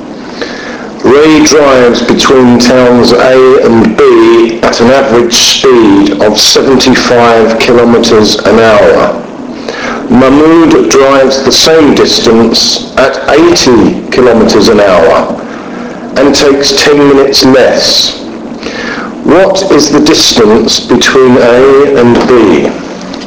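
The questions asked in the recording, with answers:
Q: What is the distance between A and B?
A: 200 kilometers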